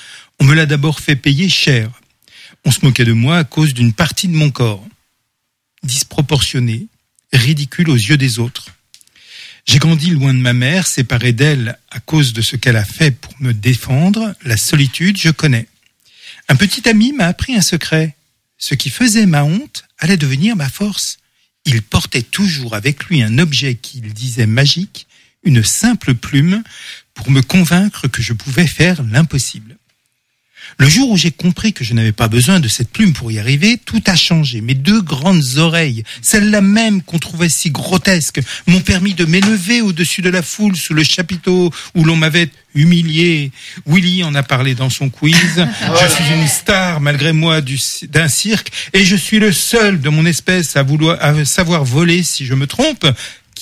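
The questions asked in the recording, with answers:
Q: Qui suis-je?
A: Dumbo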